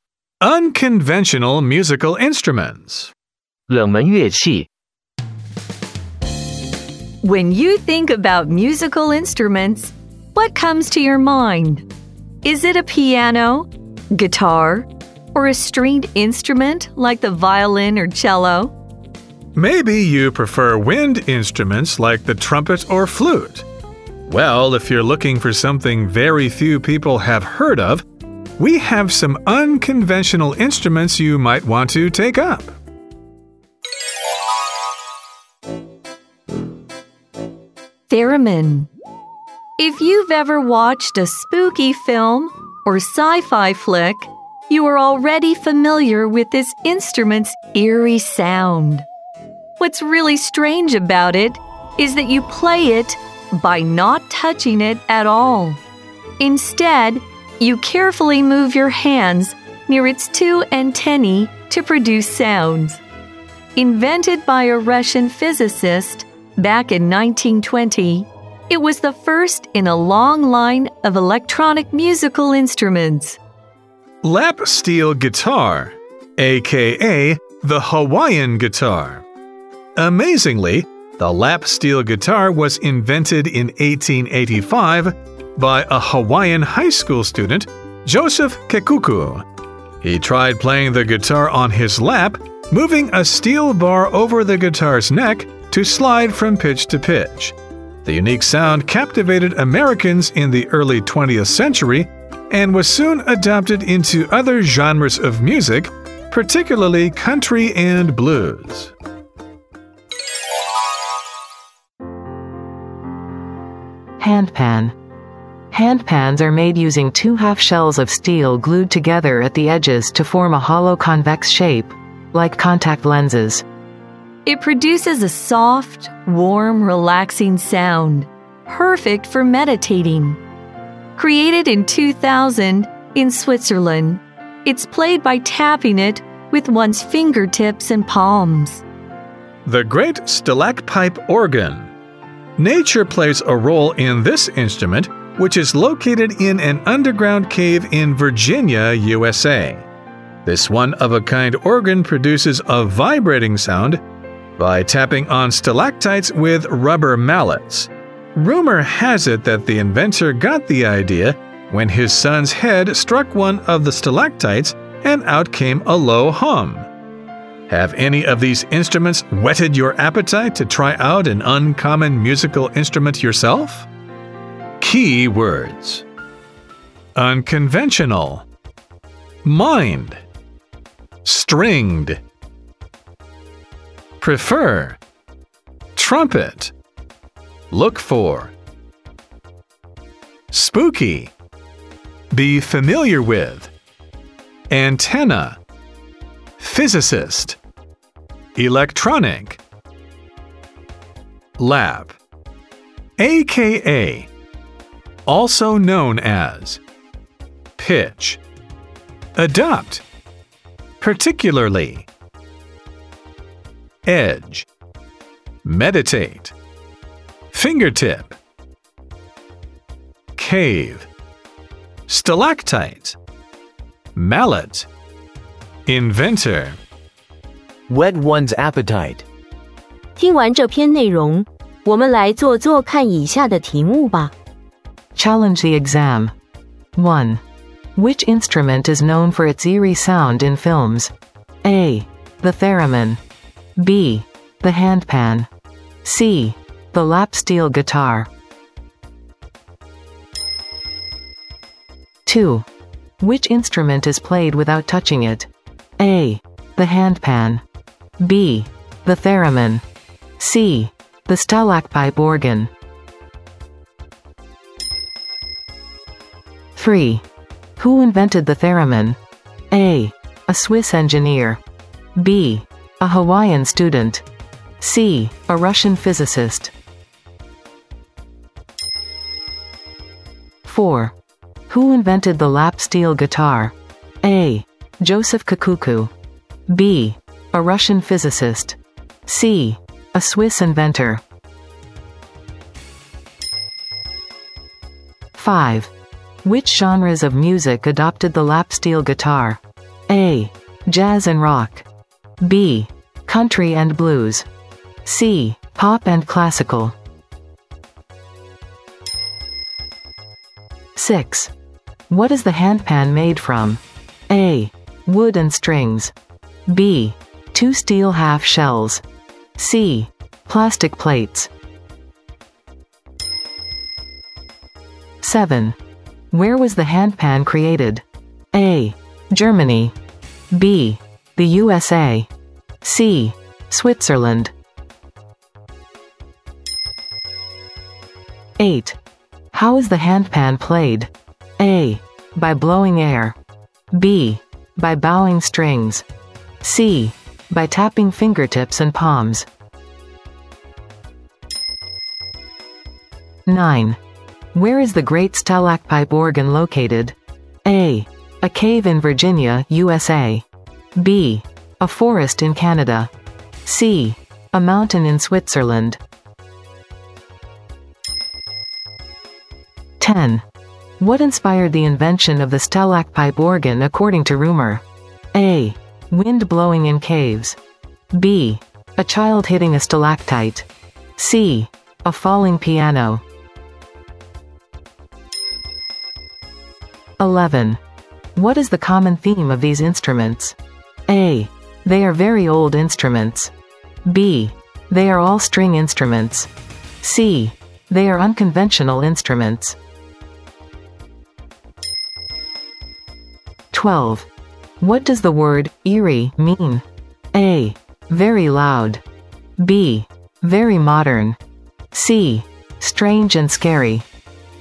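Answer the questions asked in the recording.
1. A: The theremin.
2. B: The theremin.
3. C: A Russian physicist.
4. A: Joseph Kakuku.
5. B: Country and blues.
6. B: Two steel half shells.
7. C: Switzerland.
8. C: By tapping fingertips and palms.
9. A: A cave in Virginia, USA.
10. B: A child hitting a stalactite.
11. C: They are unconventional instruments.
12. C: Strange and scary.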